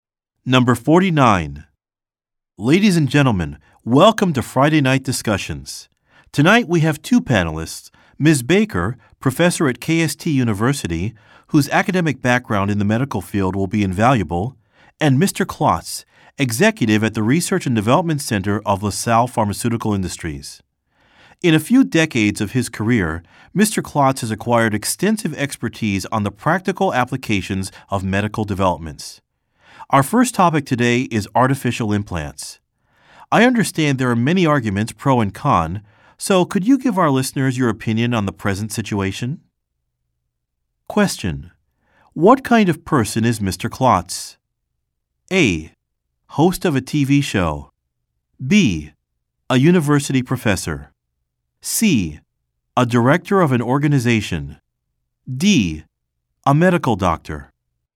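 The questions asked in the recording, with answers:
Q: what kind of person is Mr. Klotz?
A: C: A director of an organization.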